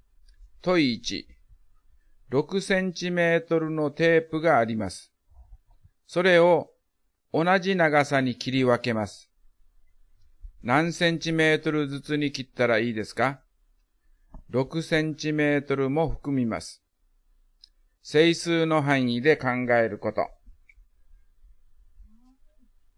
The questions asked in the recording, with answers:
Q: 何センチメートルずつに切ったらいいですか?6センチメートルも含みます。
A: 1、2、3、6が括弧に入ります